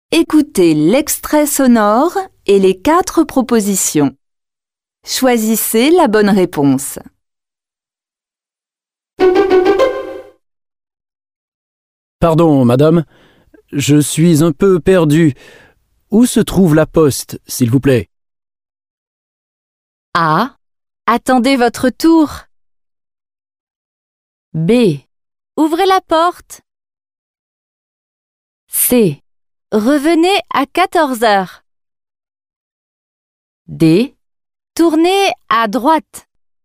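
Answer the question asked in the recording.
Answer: D: Tournez à droite.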